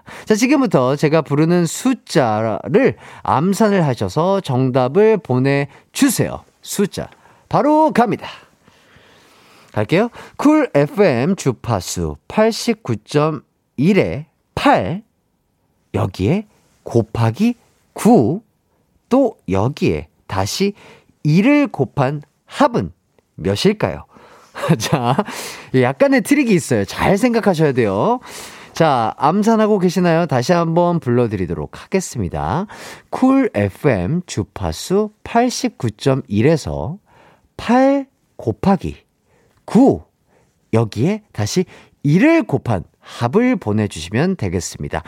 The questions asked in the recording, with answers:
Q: 쿨 FM 주파수 89.1에서 8 곱하기 9. 여기에 다시 1을 곱한 합을 보내주시면 되겠습니다.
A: 바로바로 바로 72였습니다.